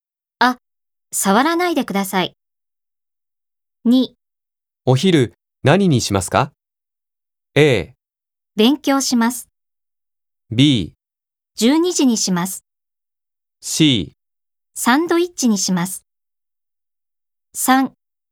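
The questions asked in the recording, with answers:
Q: お昼何にしますか?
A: C: サンドイッチにします。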